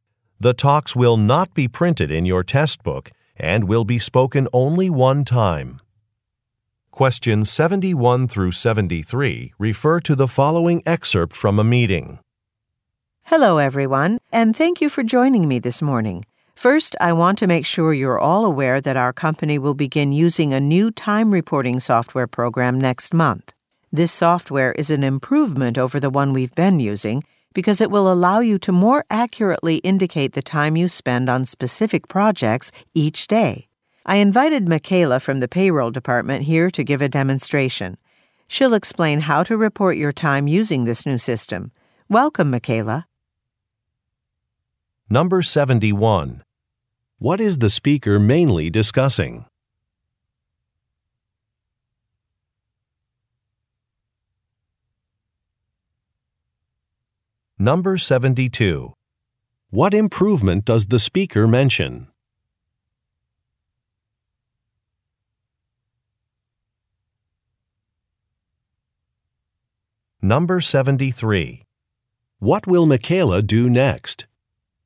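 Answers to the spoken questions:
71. New time reporting software
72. More accurate reporting of time spent on projects
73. Give a demonstration of the new system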